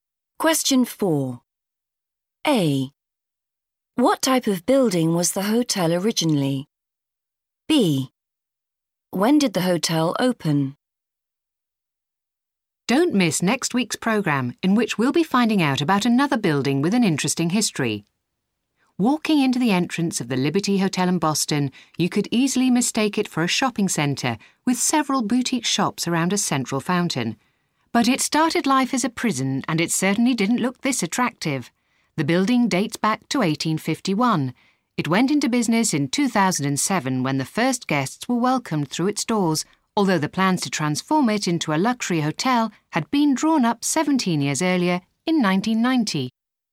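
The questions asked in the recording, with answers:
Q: What type of building was the hotel originally?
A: a prison

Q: When did the hotel open?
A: 2007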